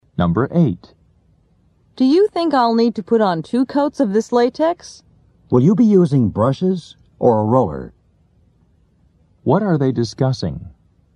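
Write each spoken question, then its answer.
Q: What are they discussing?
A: Painting (applying paint)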